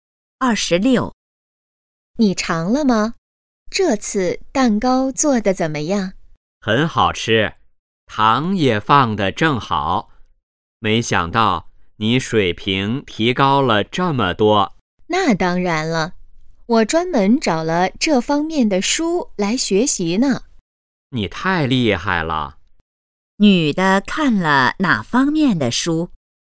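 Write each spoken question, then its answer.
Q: 女的看了哪方面的书?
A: 做蛋糕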